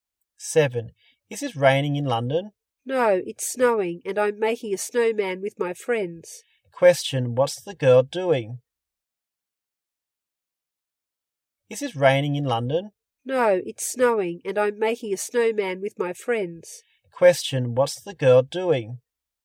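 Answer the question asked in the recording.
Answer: Making a snowman with her friends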